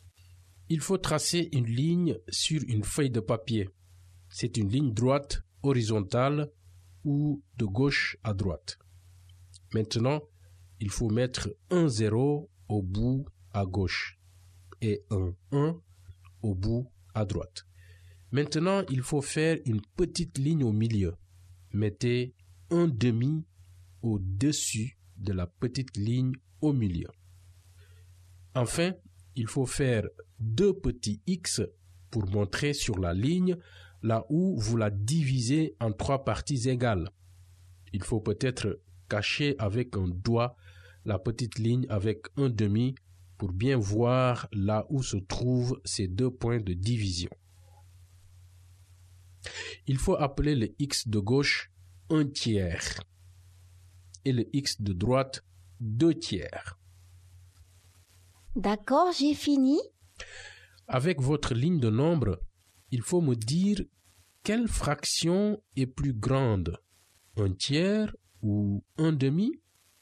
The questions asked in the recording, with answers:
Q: Avec votre ligne de nombre, il faut me dire quelle fraction est plus grande, un tiers ou un demi?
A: Je pense que c'est un demi.